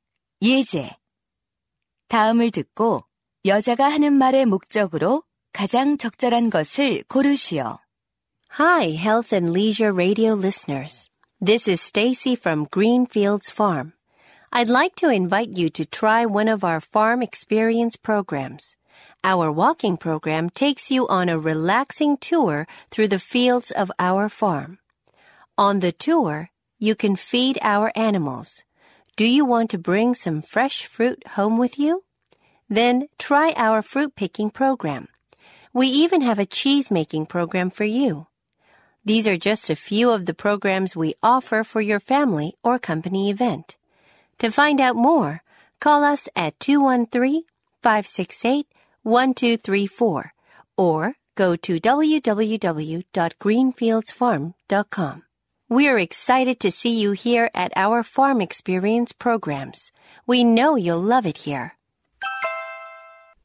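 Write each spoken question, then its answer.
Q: 다음을 듣고 여자가 하는 말의 목적으로 가장 적절한 것을 고르시오.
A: 농장 체험 프로그램 홍보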